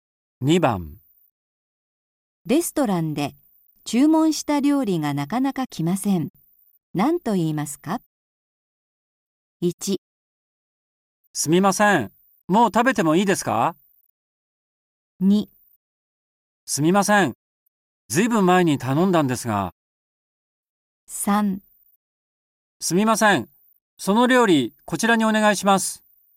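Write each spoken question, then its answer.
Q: レストランで注文した料理がなかなか来ません。何と言いますか?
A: 2: すみません、ずいぶん前に頼んだんですが。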